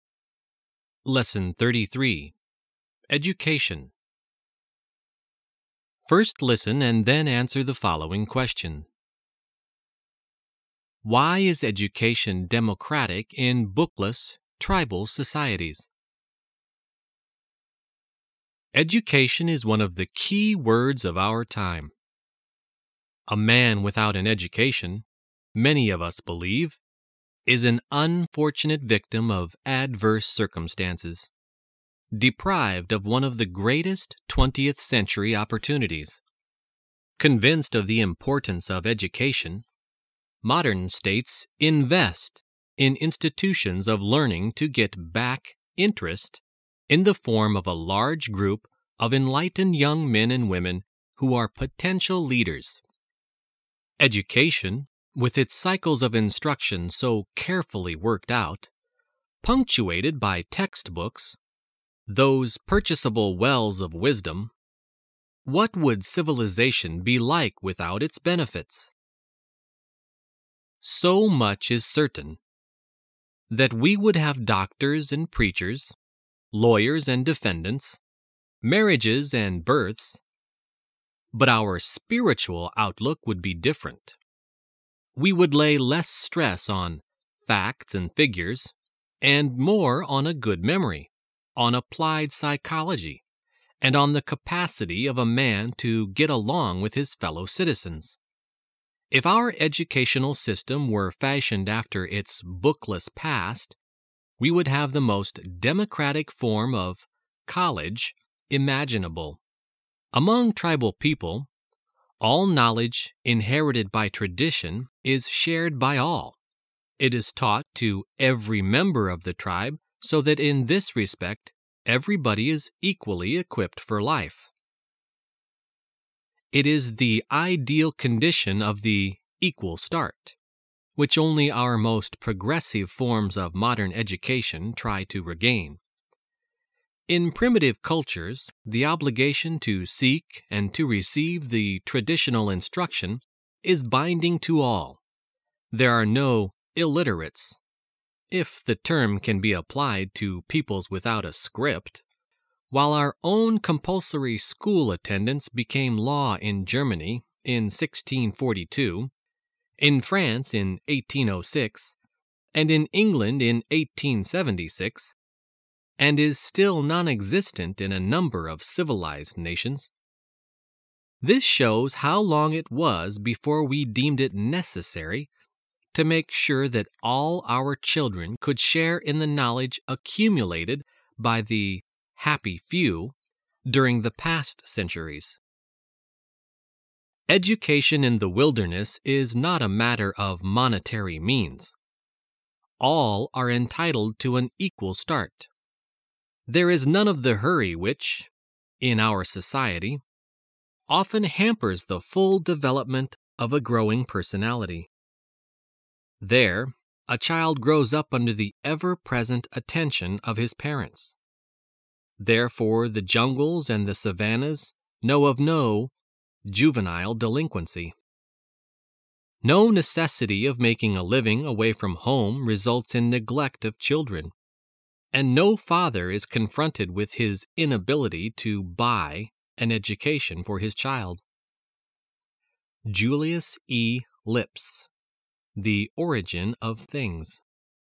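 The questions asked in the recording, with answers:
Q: Why is education democratic in bookless, tribal societies?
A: Because all traditional knowledge is shared by all and taught to every member of the tribe, so everyone has an equal start regardless of money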